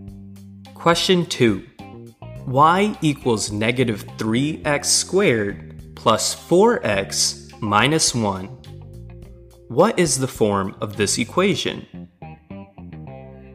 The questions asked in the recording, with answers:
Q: What is the form of this equation?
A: This equation is in the standard form.